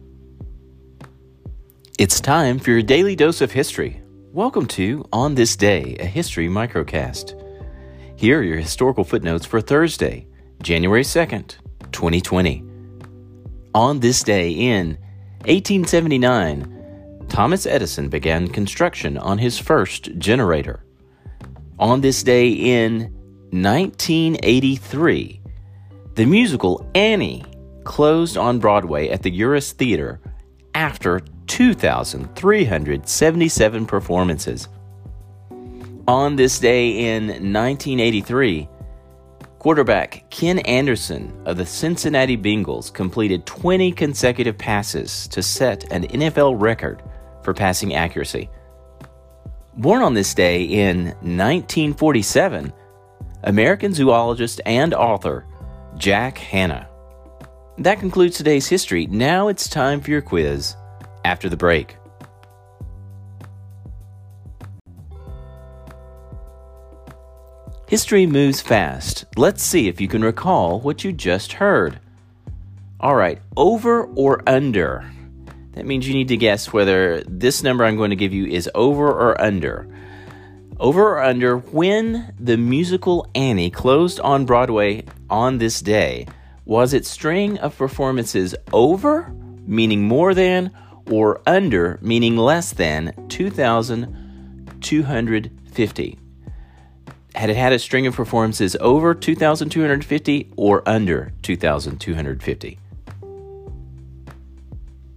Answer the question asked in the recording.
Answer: if you guessed over, you are correct.